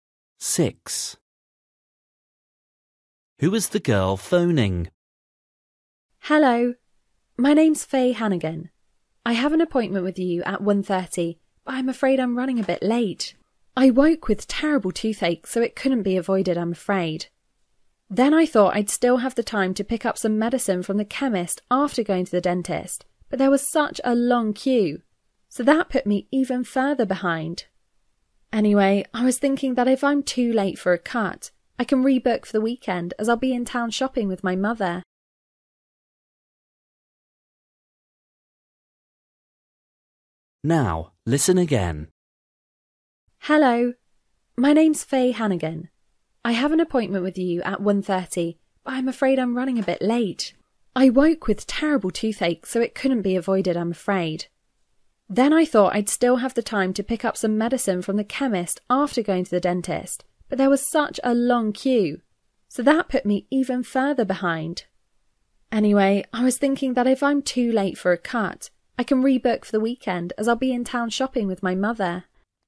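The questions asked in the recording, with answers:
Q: Who is the girl phoning?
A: the hairdresser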